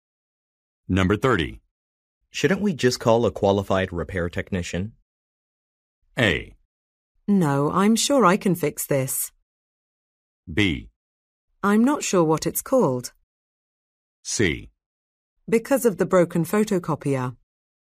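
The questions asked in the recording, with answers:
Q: Shouldn't we just call a qualified repair technician?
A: A: No, I'm sure I can fix this.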